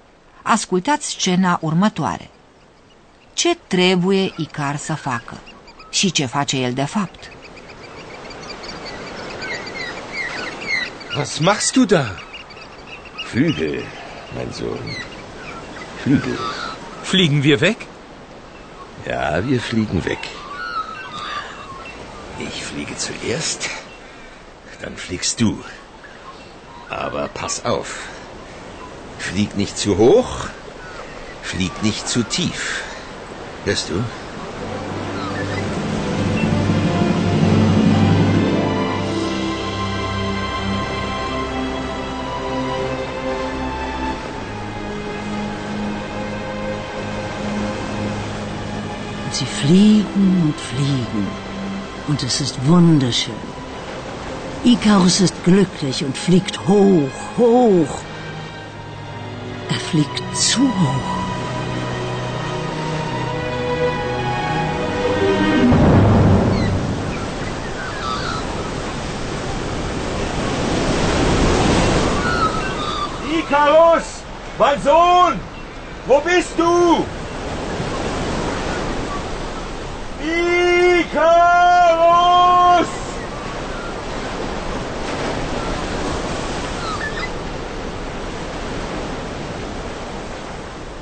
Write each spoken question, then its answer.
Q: Ce trebuie Icar să facă?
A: Îi cere să fie atent. Aber pass auf!